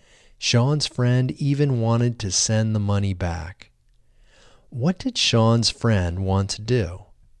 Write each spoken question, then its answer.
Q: What did Sean's friend want to do?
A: Sean's friend wanted to send the money back.